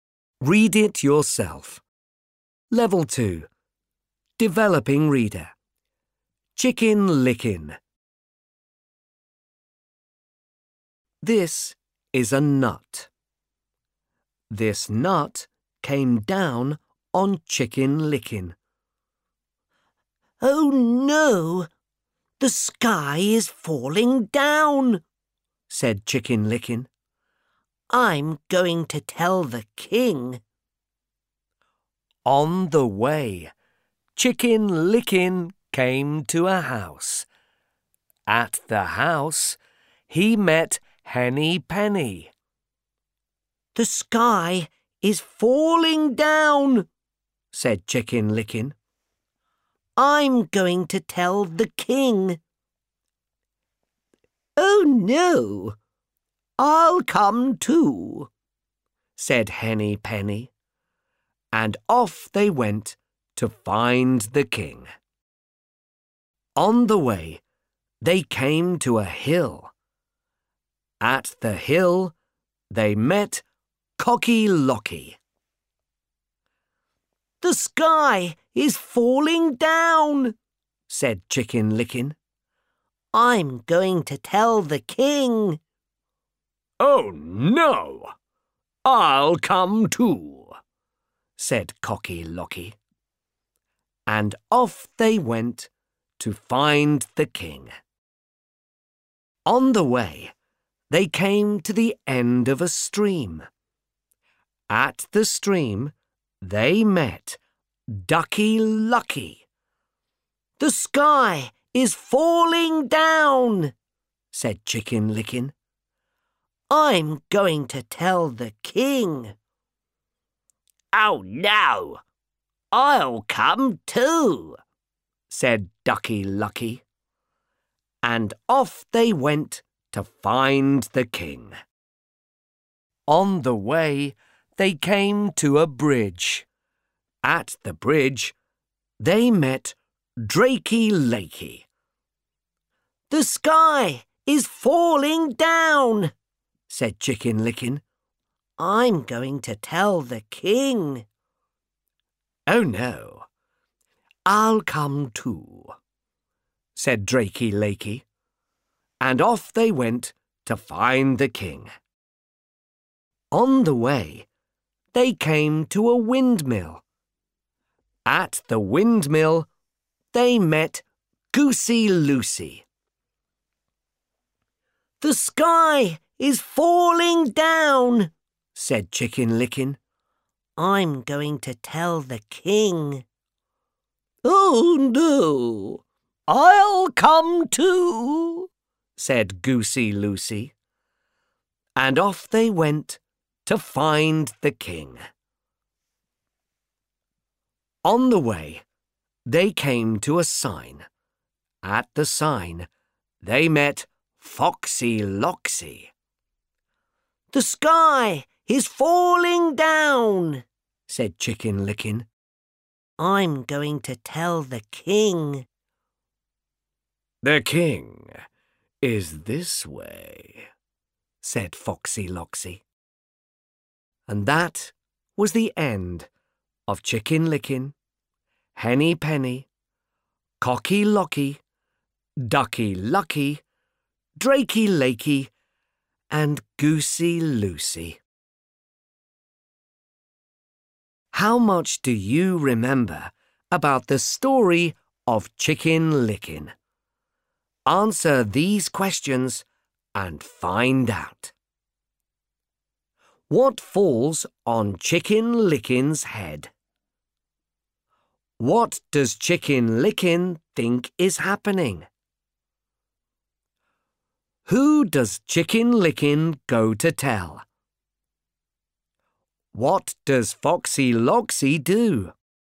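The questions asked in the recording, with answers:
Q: What falls on Chicken Licking's head?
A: A nut

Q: What does Chicken Licking think is happening?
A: The sky is falling down

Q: Who does Chicken Licking go to tell?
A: The king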